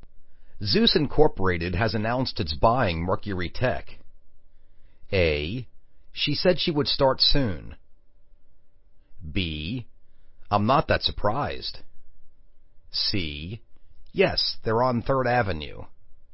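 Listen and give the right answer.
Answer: B: I'm not that surprised.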